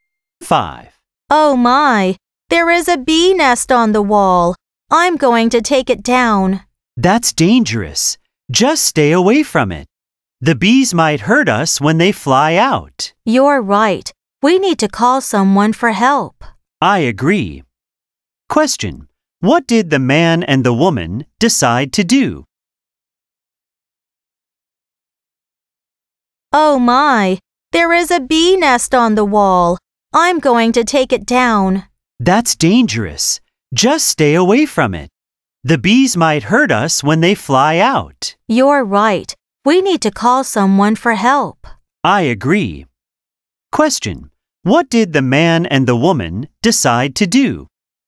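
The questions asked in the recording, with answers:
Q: What did the man and the woman decide to do?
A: Call someone for help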